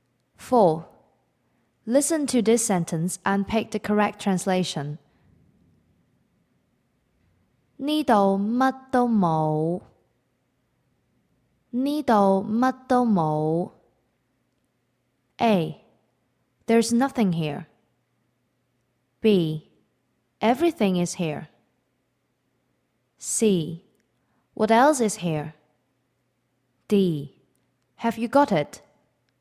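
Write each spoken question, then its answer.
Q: Listen to this sentence and pick the correct translation.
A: A: There's nothing here.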